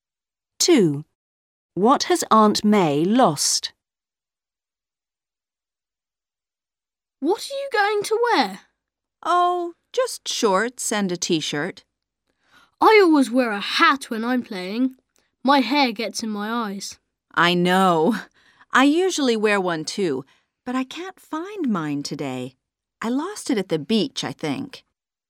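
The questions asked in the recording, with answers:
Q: What has Aunt May lost?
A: her hat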